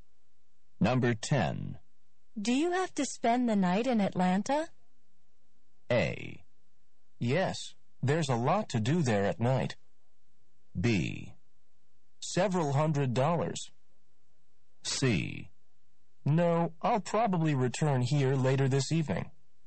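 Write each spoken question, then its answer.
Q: Do you have to spend the night in Atlanta?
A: C: No, I'll probably return here later this evening.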